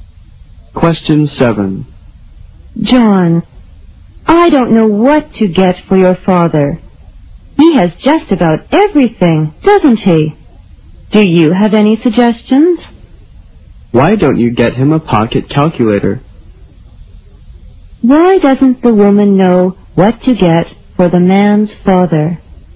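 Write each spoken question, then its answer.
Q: Why doesn't the woman know what to get for the man's father?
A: He has just about everything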